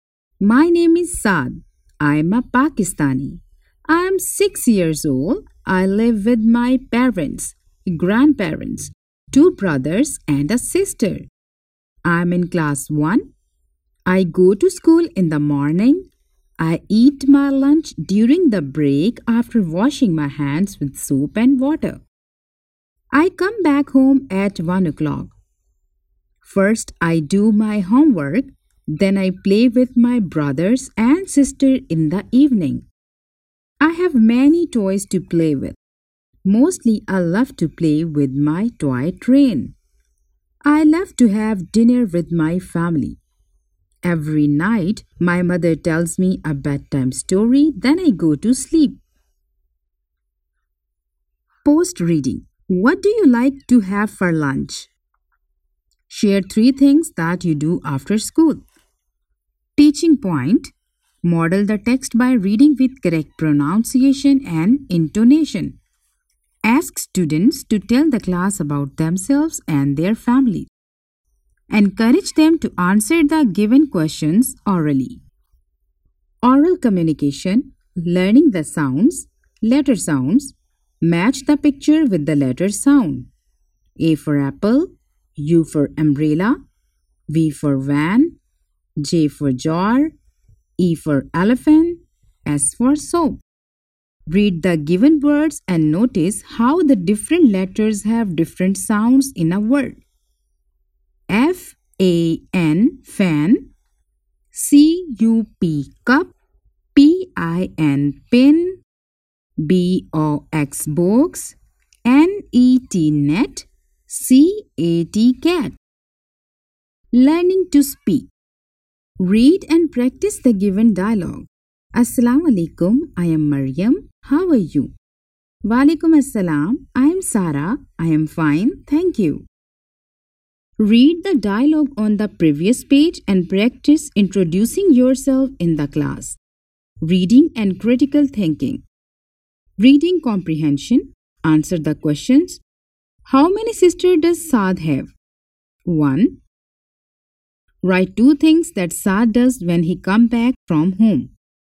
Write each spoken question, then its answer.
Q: Write 2 things that Saad does when he comes back from home.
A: He do his homework and then play with brother and sister in the evening.